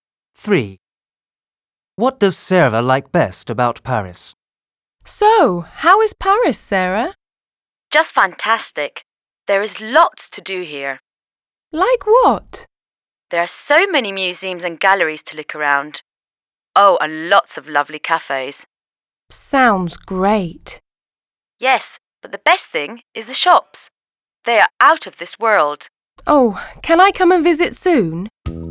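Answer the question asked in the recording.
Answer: The shops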